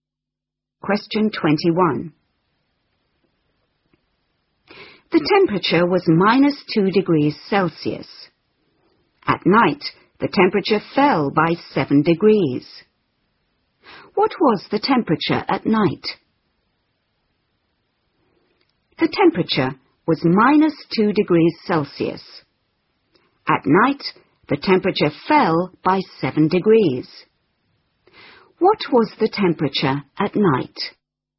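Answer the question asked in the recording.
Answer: -9 degrees Celsius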